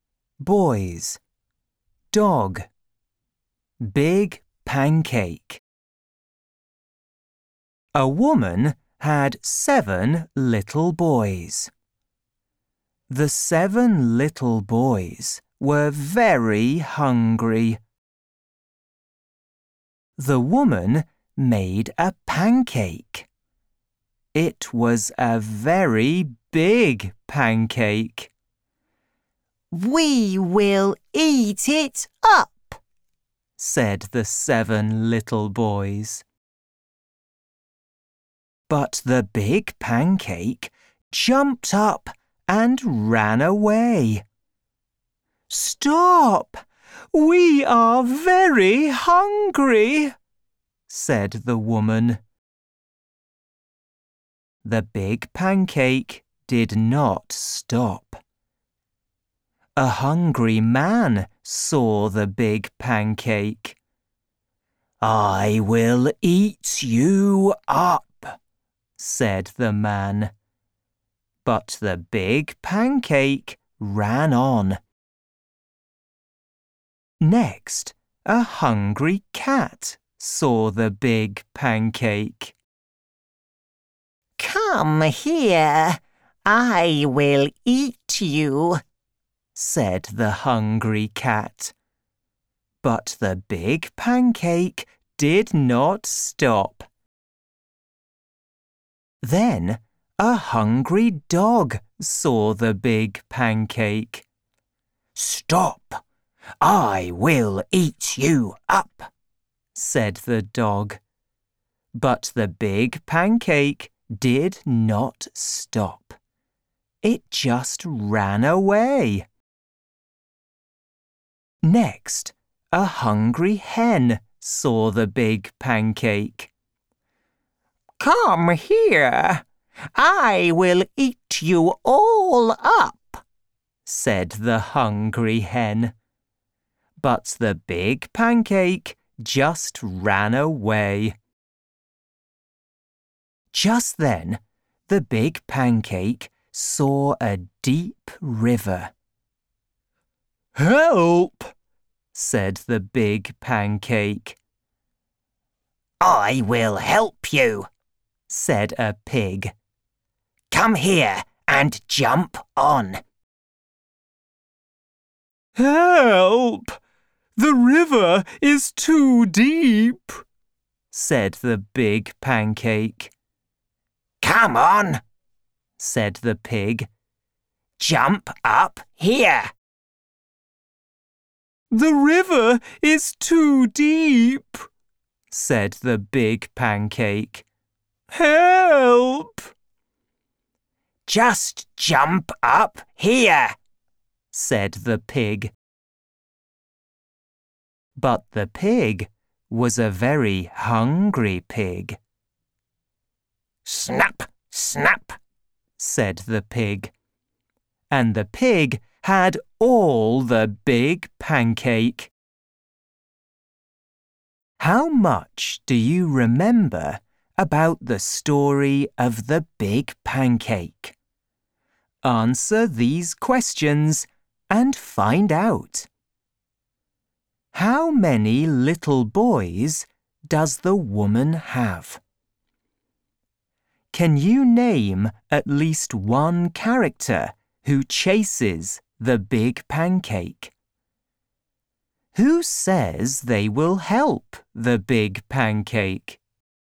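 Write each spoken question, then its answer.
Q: How many little boys does the woman have?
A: Seven

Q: Can you name at least one character who chases the big pancake?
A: The man (also the cat, dog or hen)

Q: Who says they will help the big pancake?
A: The pig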